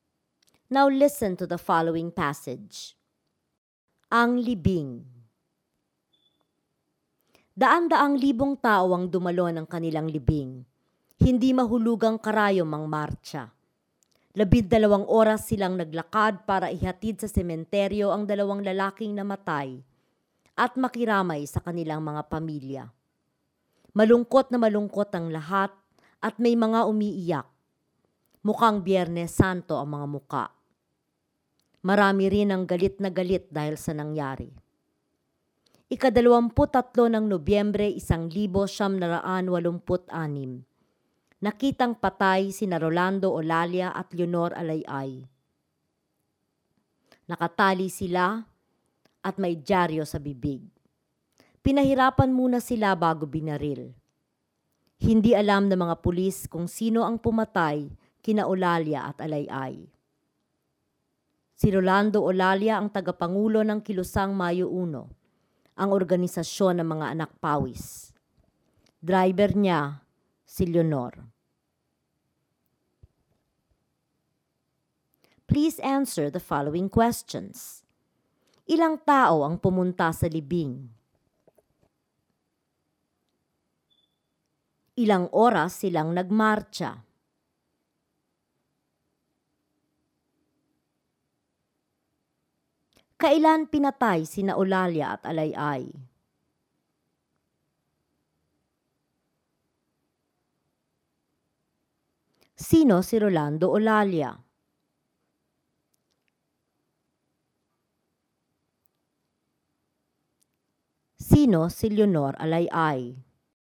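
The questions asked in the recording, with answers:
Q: Ilang tao ang pumunta sa libing?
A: Daan-daang libong tao

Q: Ilang oras silang nagmarcha?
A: 12 oras

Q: Kailan pinatay sina Olalia at Alayay?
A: 23 ng Nobyembre 1986

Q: Sino si Rolando Olalia?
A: Tagapangulo ng Kilusang Mayo 1

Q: Sino si Leonor Alayay?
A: Driver ni Rolando Olalia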